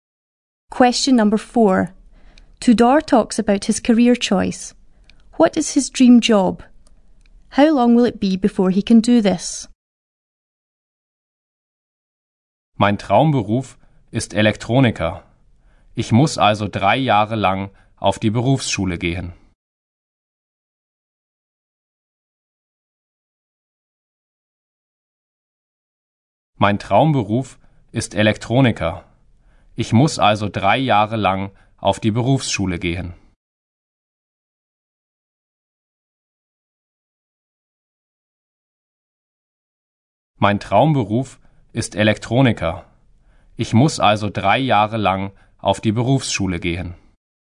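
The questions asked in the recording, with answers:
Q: What is his dream job?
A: Electronics technician

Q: How long will it be before he can do this?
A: 3 years at vocational school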